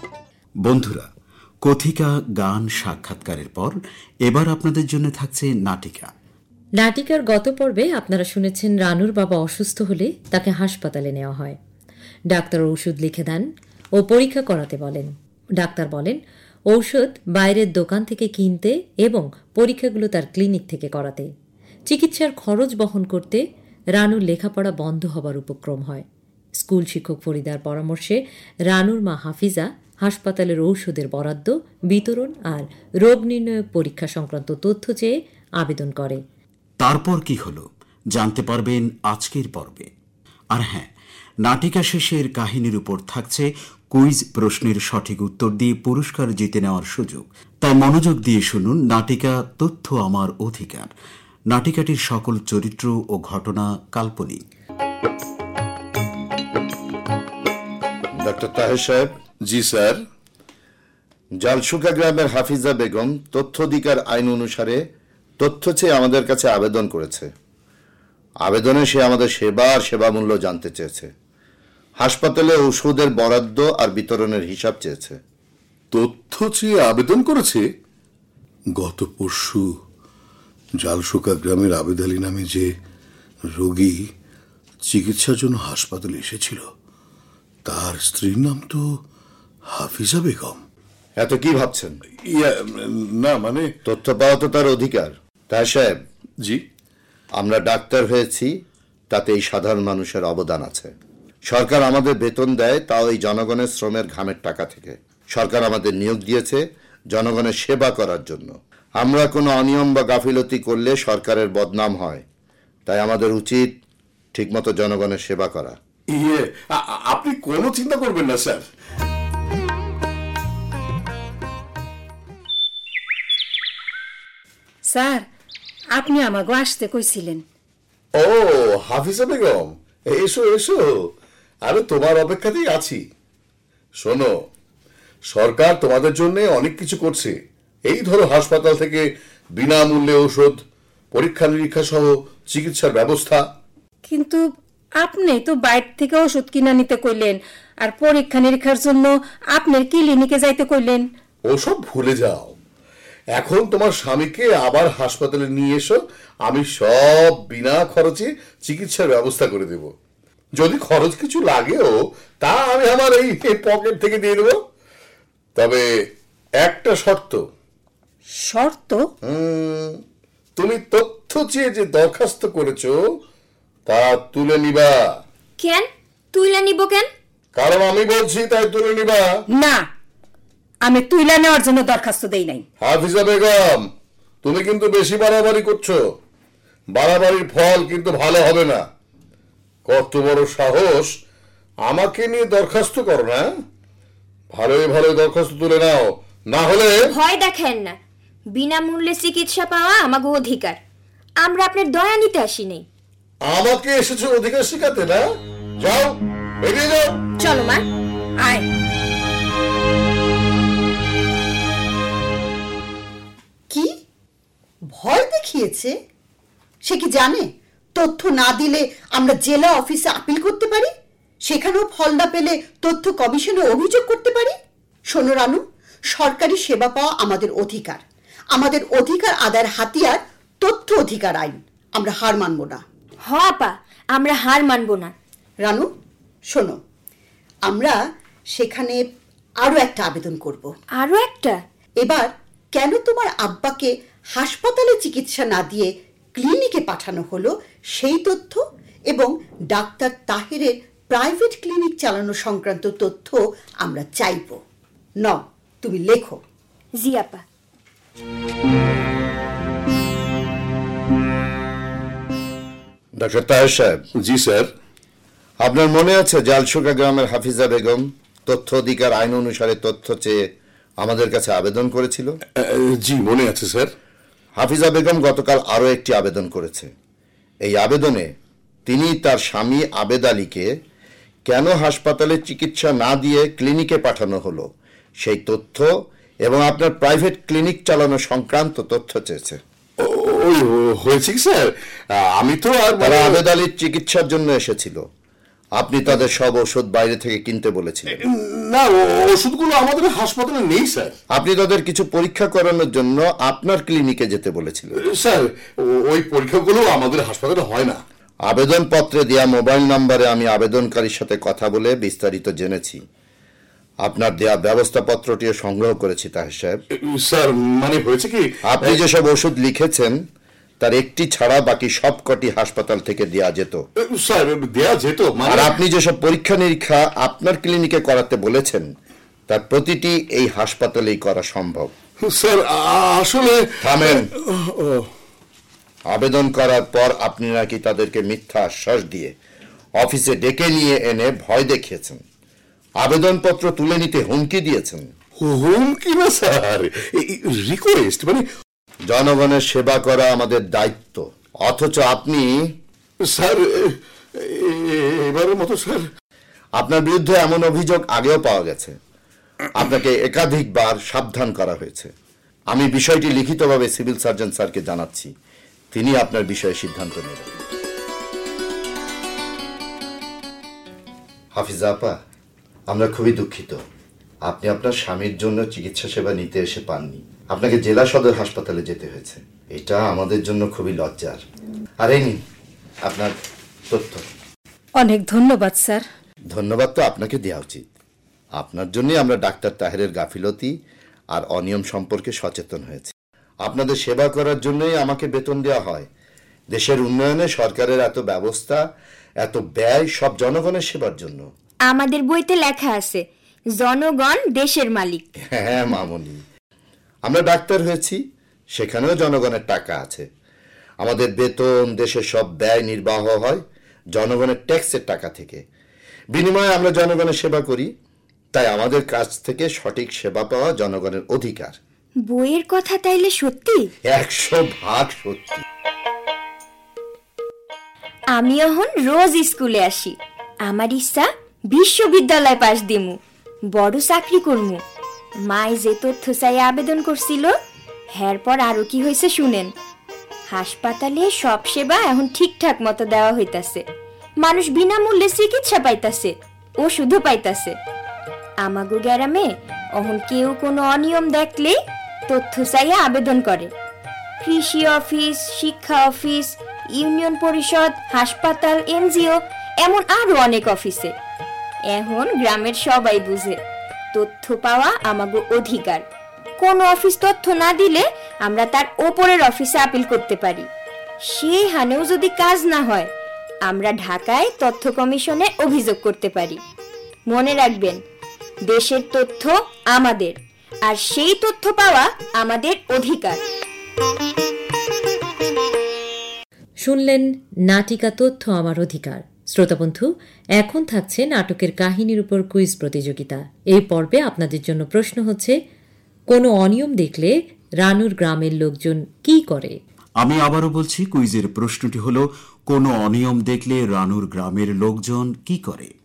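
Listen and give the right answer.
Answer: তথ্য চেয়ে আবেদন করে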